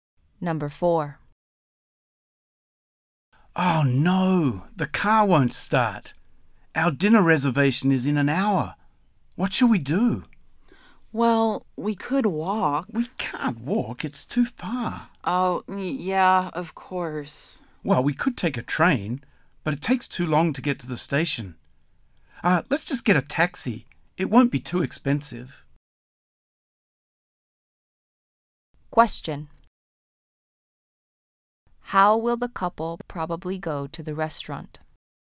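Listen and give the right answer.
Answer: By taxi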